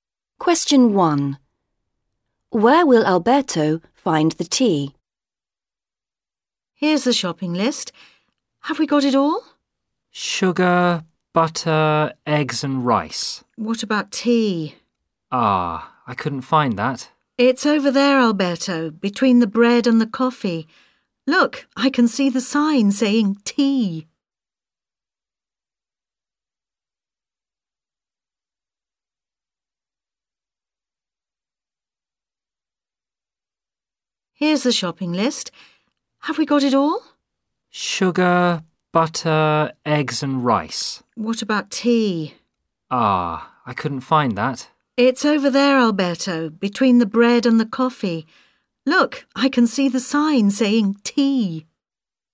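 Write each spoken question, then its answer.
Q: Where will Alberto find the tea?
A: Between the bread and the coffee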